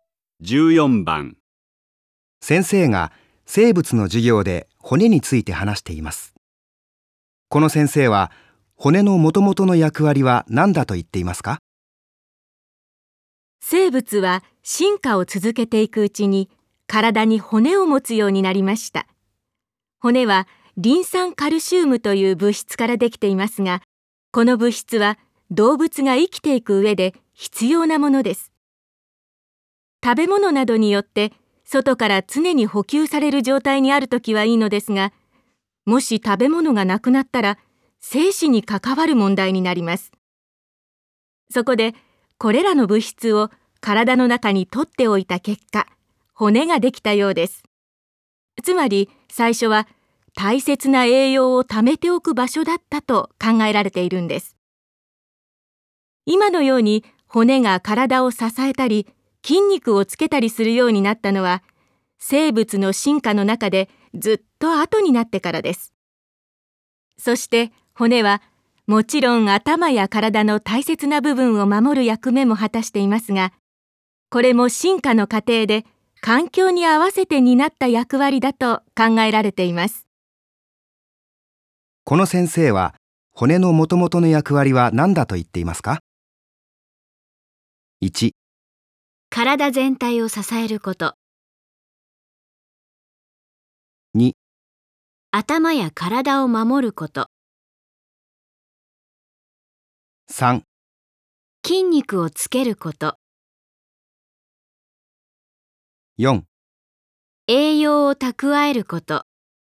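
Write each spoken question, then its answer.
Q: この先生は骨のもともとの役割は何だと言っていますか?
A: 4: 栄養を蓄えること。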